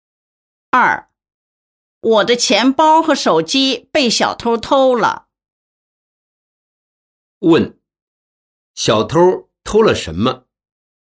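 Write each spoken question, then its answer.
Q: 小偷偷了什么?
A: 钱包和手机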